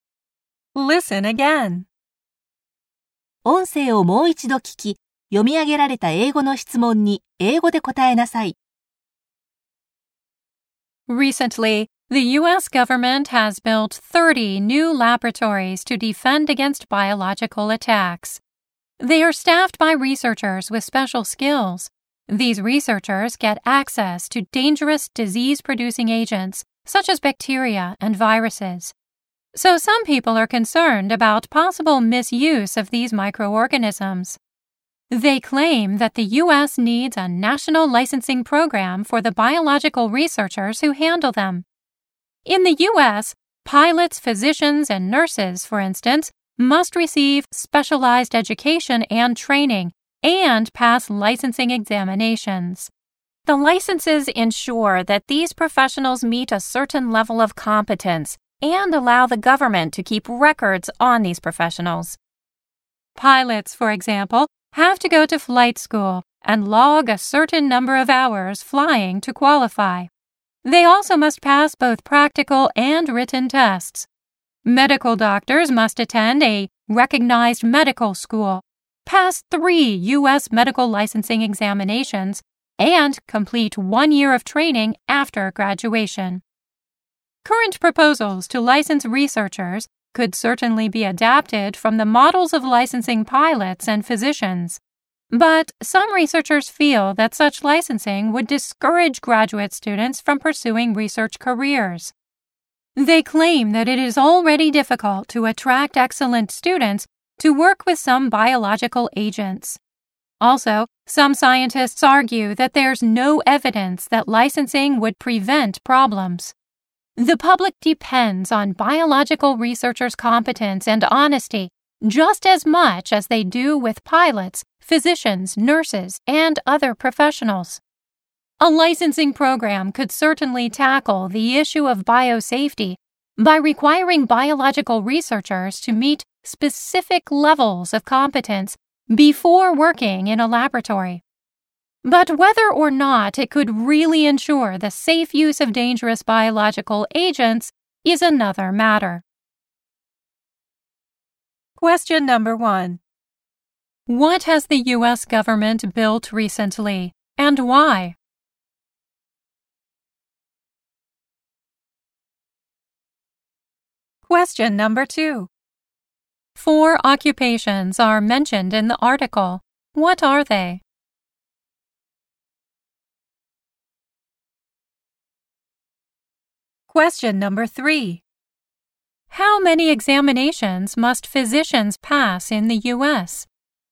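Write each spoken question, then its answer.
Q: What has the U.S. government built recently, and why?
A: 30 new laboratories, to defend against biological attacks

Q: 4 occupations are mentioned in the article. What are they?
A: Pilots, physicians, nurses, and biological researchers

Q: How many examinations must physicians pass in the U.S.?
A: Three (U.S. medical licensing examinations)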